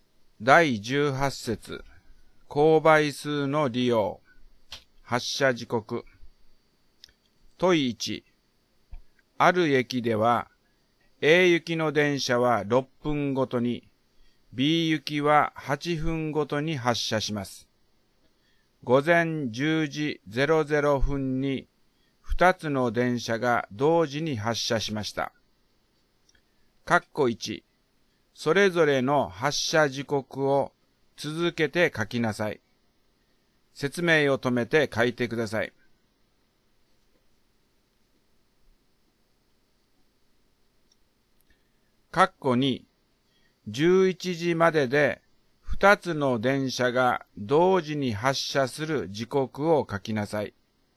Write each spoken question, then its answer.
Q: 括弧2、11時までで2つの電車が同時に発車する時刻を書きなさい。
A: 問1、括弧2の答えは、10時24分と10時48分になりますね。